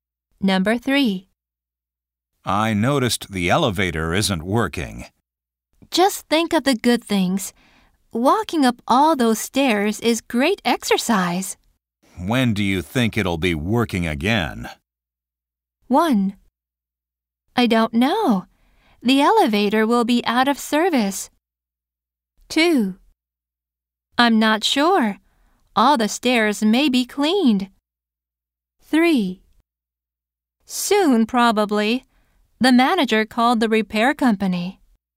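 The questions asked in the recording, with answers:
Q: When do you think it'll be working again?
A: 3: Soon, probably. The manager called the repair company.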